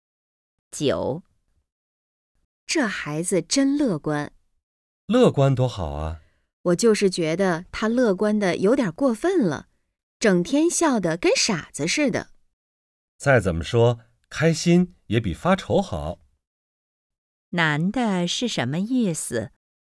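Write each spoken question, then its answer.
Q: 男的是什么意思?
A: 开心比发愁好,乐观是好事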